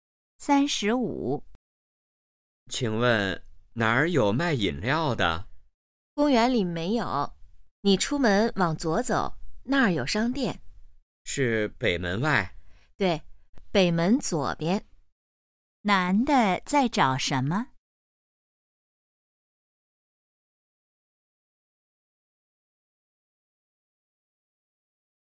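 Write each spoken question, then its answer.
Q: 男的在找什么?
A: 卖饮料的地方(商店)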